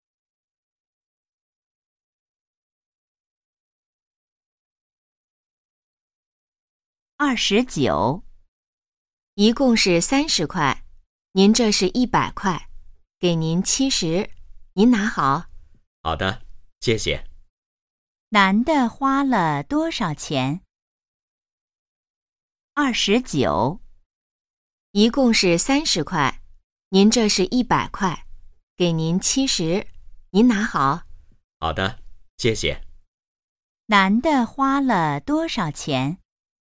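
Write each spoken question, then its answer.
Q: 男的花了多少钱?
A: 30块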